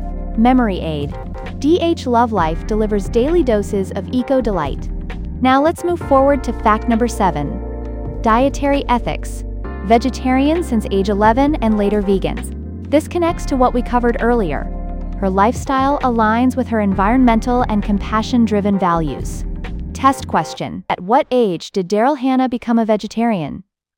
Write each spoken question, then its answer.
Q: At what age did Daryl Hannah become a vegetarian?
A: 11.